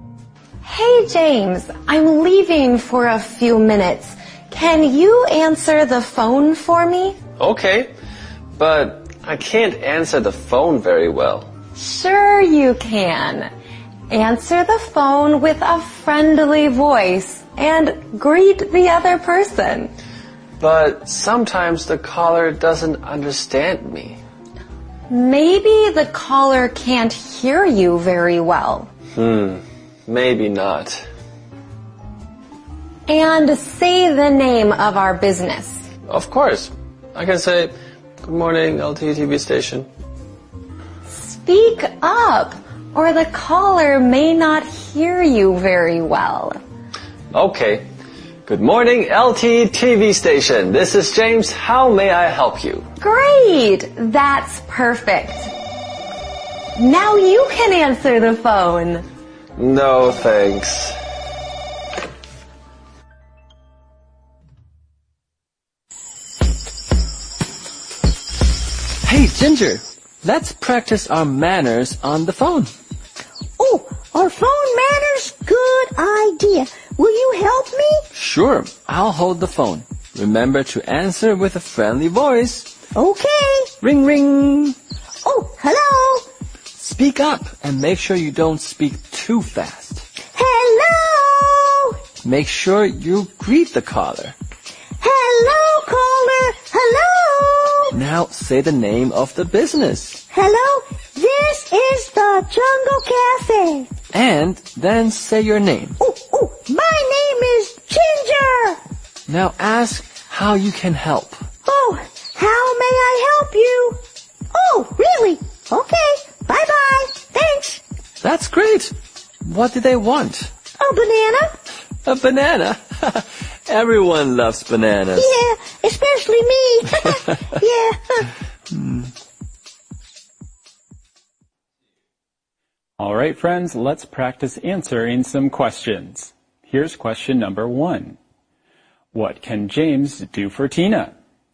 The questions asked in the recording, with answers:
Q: What can James do for Tina?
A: He can answer the phone for her.